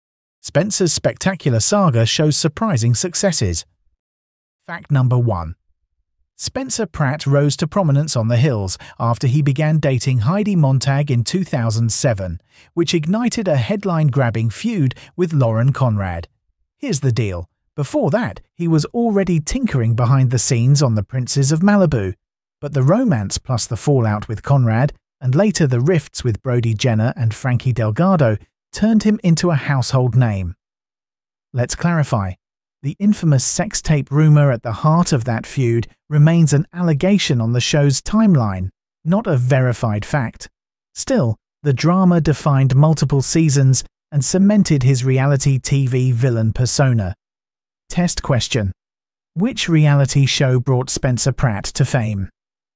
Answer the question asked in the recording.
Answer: Correct answer. The Hills.